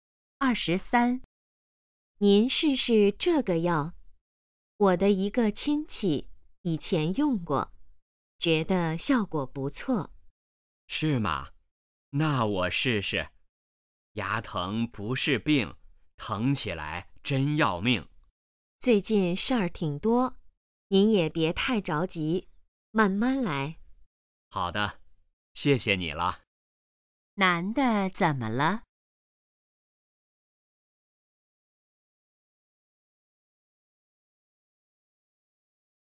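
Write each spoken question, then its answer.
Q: 男的怎么了?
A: 牙疼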